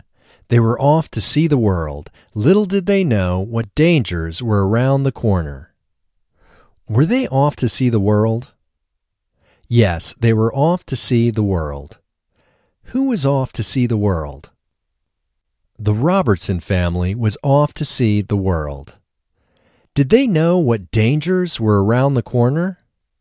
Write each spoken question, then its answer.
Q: Did they know what dangers were around the corner?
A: No, they didn't know what dangers were around the corner.